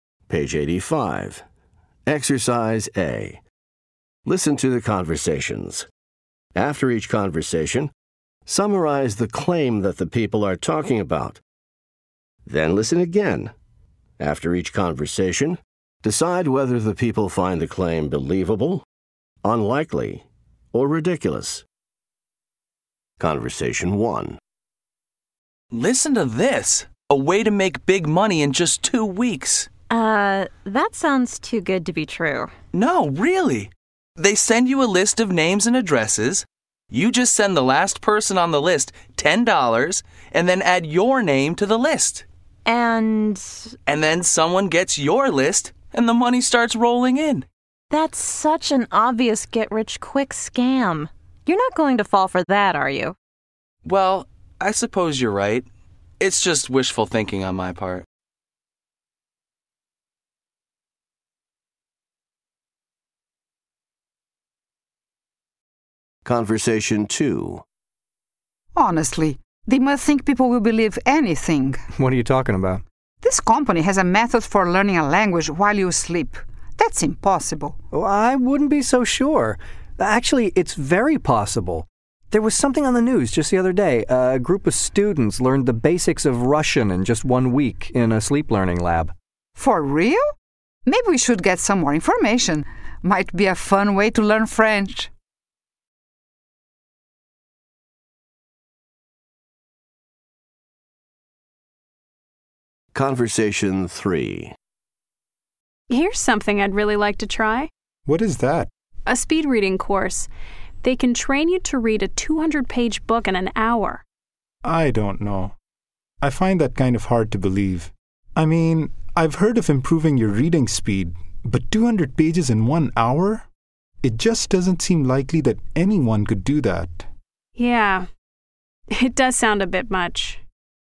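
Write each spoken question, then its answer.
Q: After each conversation, decide whether the people find the claim believable, unlikely, or ridiculous.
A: ridiculous

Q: After each conversation, decide whether the people find the claim believable, unlikely, or ridiculous.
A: believable

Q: After each conversation, decide whether the people find the claim believable, unlikely, or ridiculous.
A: unlikely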